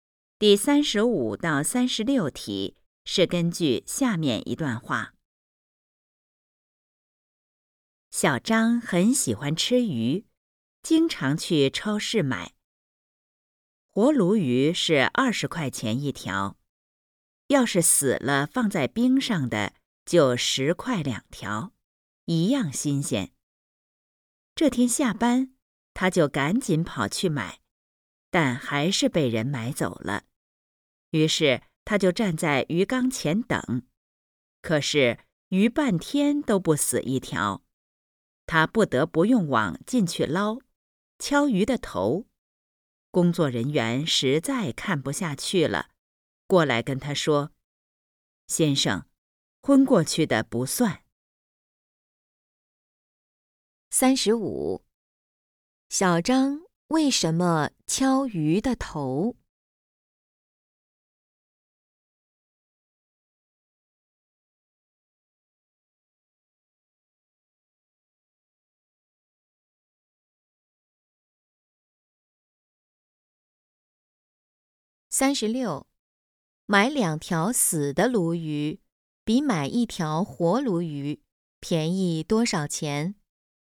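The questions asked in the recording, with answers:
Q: 买两条死的鲈鱼比买一条活鲈鱼便宜多少钱?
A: 10块钱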